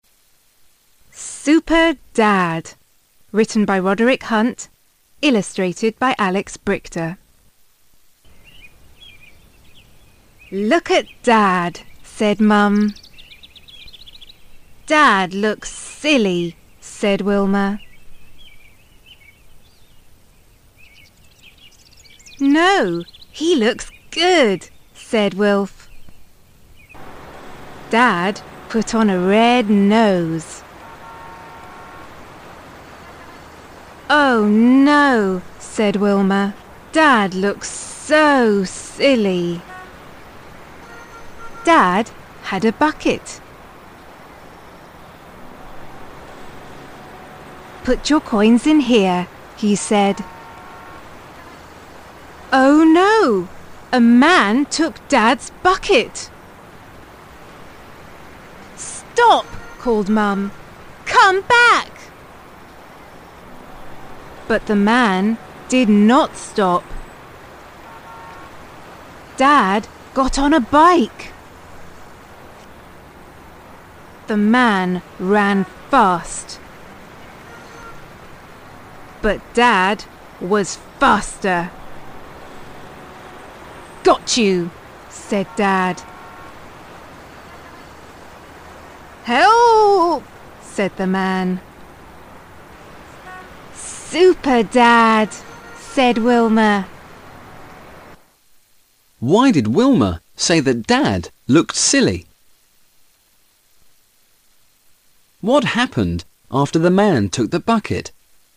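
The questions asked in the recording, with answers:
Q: What happened after the man took the bucket?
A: Mum called stop, and Dad got on a bike and chased him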